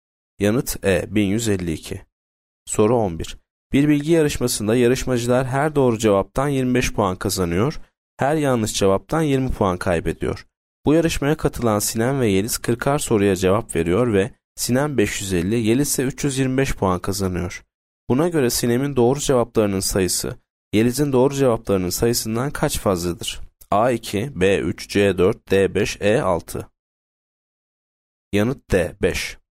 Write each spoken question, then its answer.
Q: Buna göre Sinem'in doğru cevaplarının sayısı, Yeliz'in doğru cevaplarının sayısından kaç fazladır?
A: Yanıt D 5.